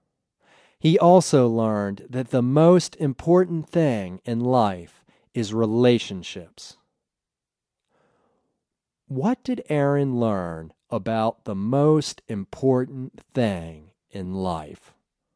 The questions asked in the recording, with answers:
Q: What did Aaron learn about the most important thing in life?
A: Aaron learned that the most important thing in life is relationships.